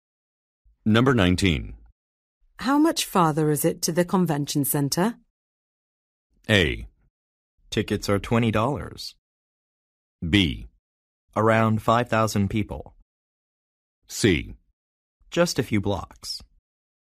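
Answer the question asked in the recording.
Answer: C: Just a few blocks.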